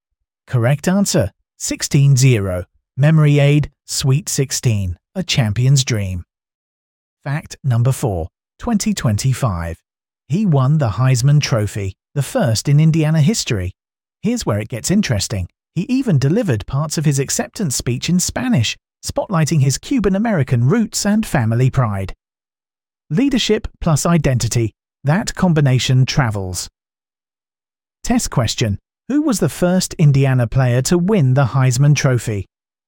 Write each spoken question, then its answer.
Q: Who was the first Indiana player to win the Heisman Trophy?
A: Correct answer. Fernando Mendoza.